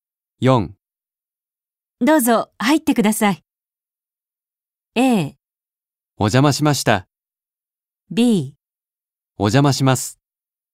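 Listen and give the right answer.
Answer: B: お邪魔します。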